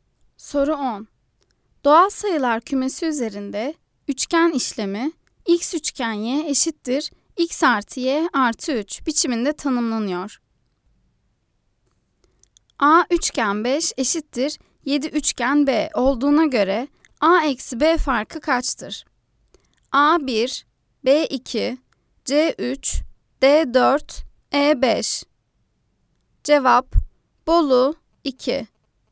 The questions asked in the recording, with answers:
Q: A üçgen 5 eşittir 7 üçgen B olduğuna göre A eksi B farkı kaçtır?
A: Cevap Bolu 2.